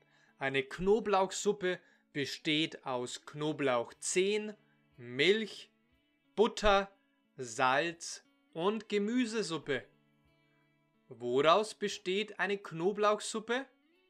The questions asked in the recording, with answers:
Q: Woraus besteht eine Knoblauchsuppe?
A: Eine Knoblauchsuppe besteht aus Knoblauchzehen, Milch, Butter, Salz und Gemüsesuppe.